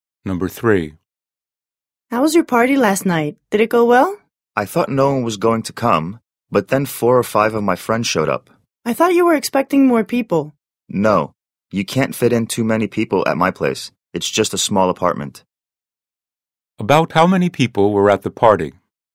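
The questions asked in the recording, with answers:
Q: About how many people were at the party?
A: 4 or 5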